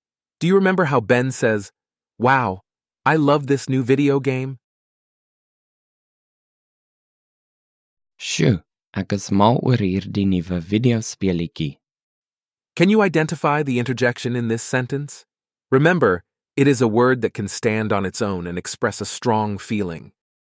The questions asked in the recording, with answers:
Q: Can you identify the interjection in this sentence?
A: The interjection in this sentence is sjoe, and it is close in meaning to the English word wow.